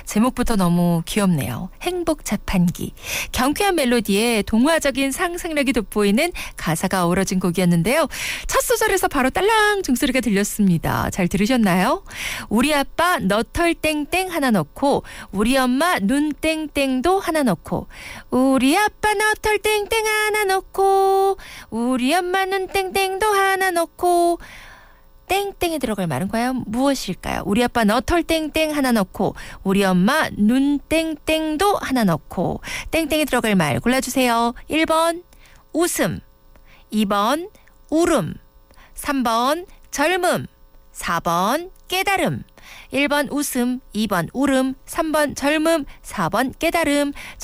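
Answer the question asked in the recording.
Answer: 1: 웃음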